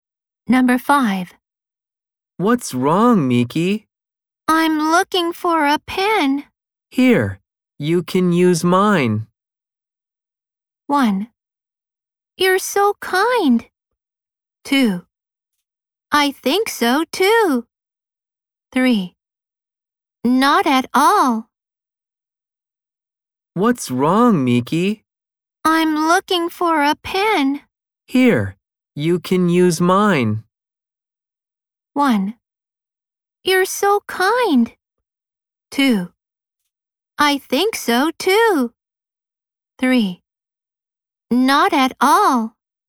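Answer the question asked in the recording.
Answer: 1: You're so kind.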